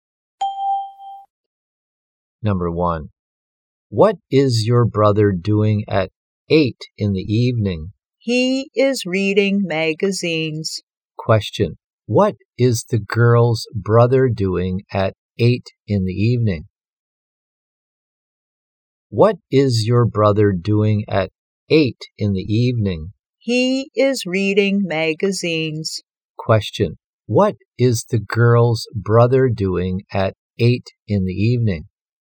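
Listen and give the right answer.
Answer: He is reading magazines.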